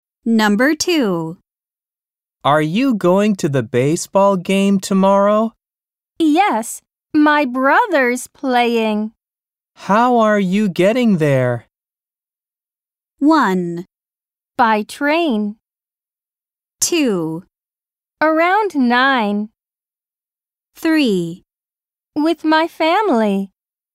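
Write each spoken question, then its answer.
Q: How are you getting there?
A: 1: By train.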